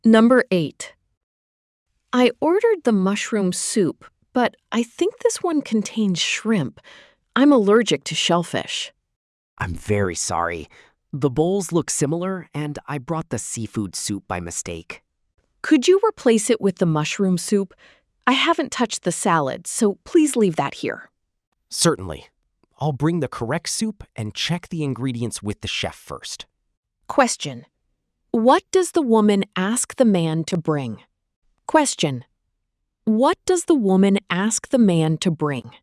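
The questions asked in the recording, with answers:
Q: What does the woman ask the man to bring?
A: The mushroom soup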